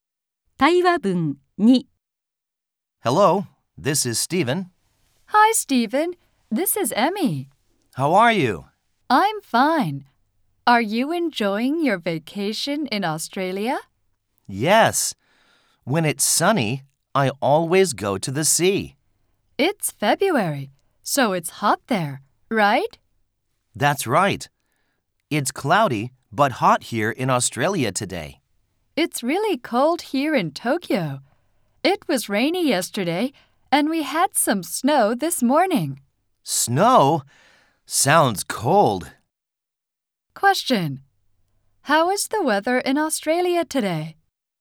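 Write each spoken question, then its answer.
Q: How is the weather in Australia today?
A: It's cloudy but hot.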